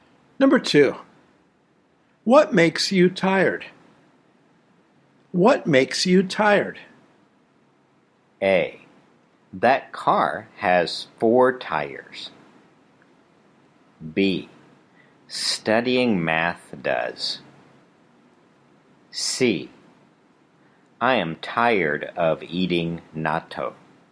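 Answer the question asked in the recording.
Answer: B: Studying math does.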